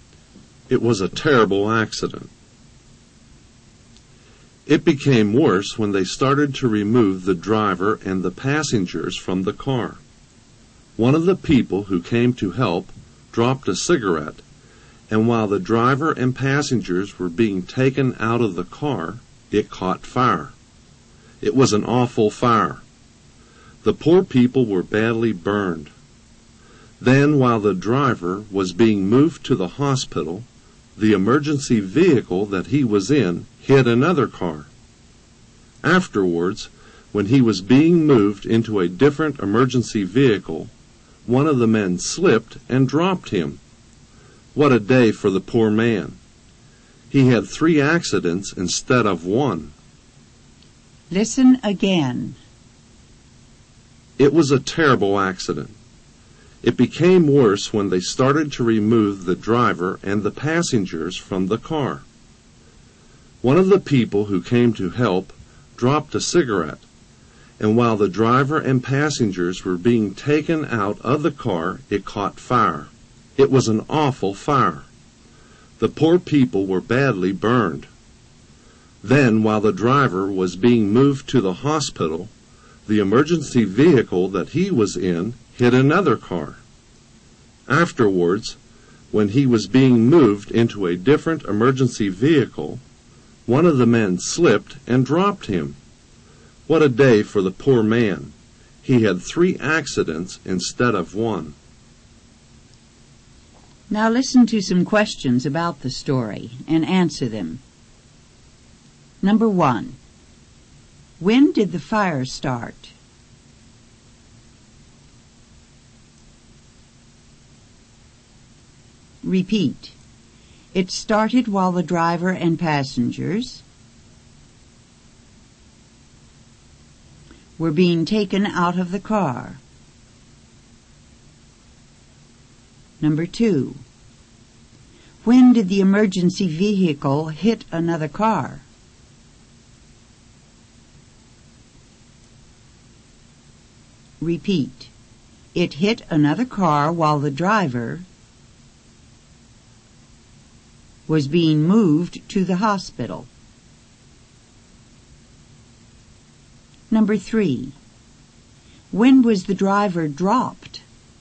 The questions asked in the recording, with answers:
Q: when did the fire start?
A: It started while the driver and passengers were being taken out of the car.

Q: When was the driver dropped?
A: He was dropped when he was being moved into a different emergency vehicle.